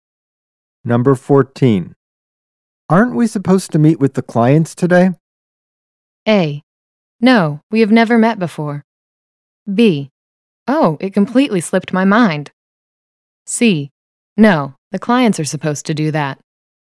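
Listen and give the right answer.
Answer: B: Oh, it completely slipped my mind.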